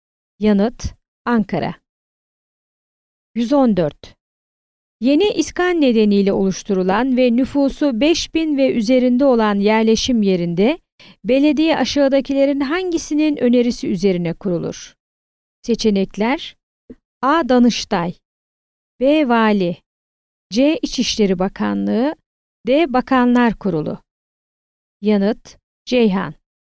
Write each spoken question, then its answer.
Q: Yeni iskan nedeniyle oluşturulan ve nüfusu 5000 ve üzerinde olan yerleşim yerinde belediye aşağıdakilerin hangisinin önerisi üzerine kurulur?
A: Yanıt: Ceyhan.